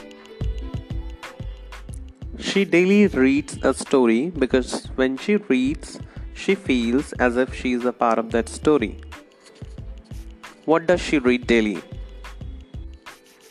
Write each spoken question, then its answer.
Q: What does she read daily?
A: She reads a story daily.